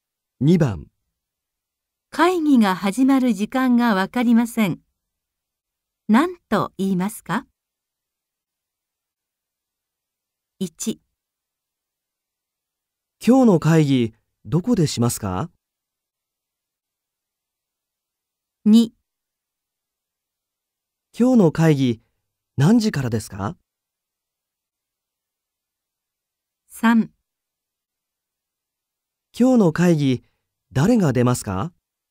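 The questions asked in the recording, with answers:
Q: 会議が始まる時間がわかりません。何と言いますか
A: 2: 今日の会議何時からですか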